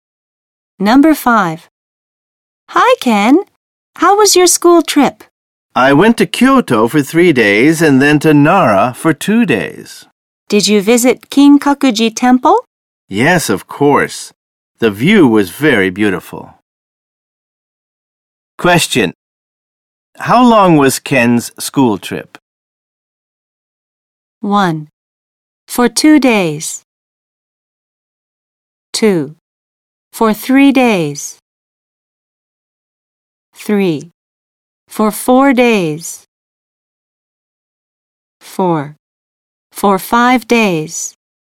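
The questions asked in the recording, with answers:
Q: How long was Ken's school trip?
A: 4: For 5 days.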